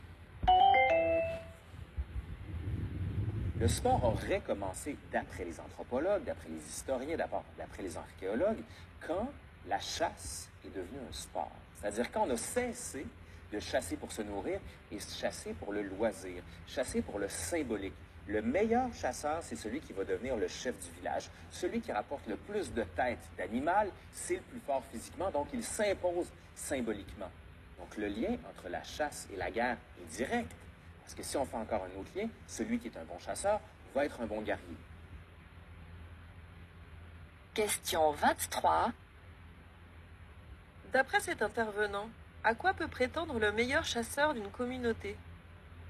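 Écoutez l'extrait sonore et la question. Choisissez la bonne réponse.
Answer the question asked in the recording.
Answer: Devenir le chef du village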